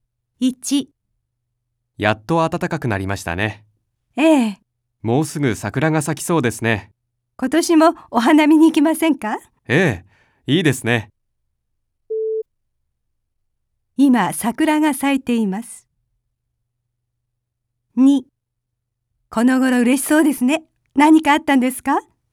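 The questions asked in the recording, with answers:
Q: 今桜が咲いています。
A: ×(まだ咲いていない)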